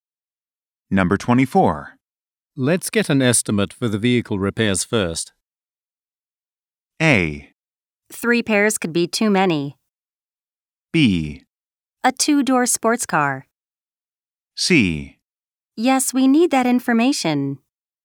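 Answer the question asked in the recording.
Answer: C: Yes, we need that information.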